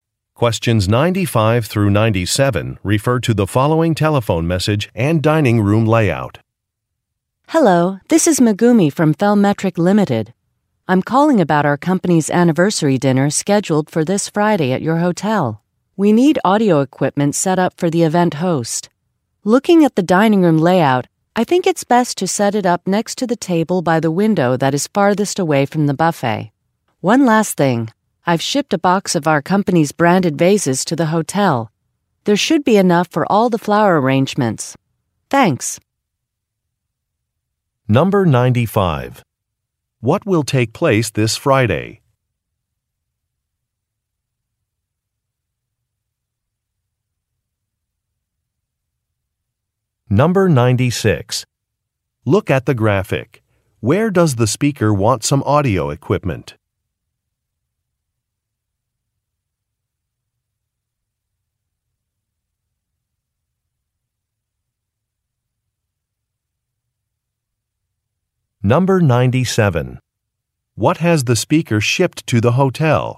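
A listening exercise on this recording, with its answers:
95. What will take place this Friday?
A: A company anniversary event

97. What has the speaker shipped to the hotel?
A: Some vases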